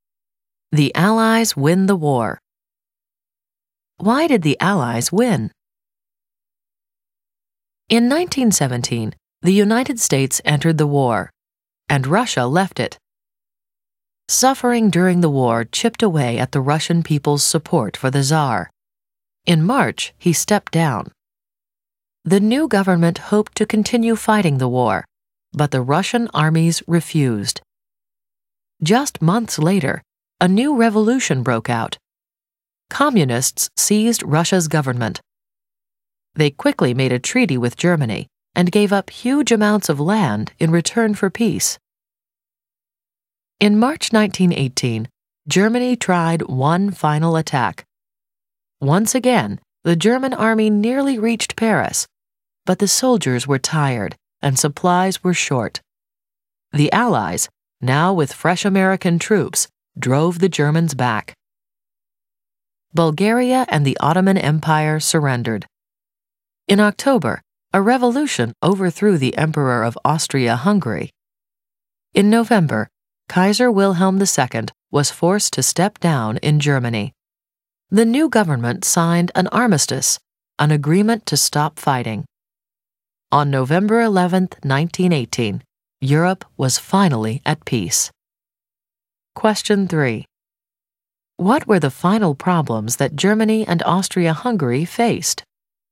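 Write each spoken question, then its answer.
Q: What were the final problems that Germany and Austria-Hungary faced?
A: Tired soldiers and short supplies, Allied counterattack with American troops, revolution overthrew Austria-Hungary's emperor, Kaiser forced to step down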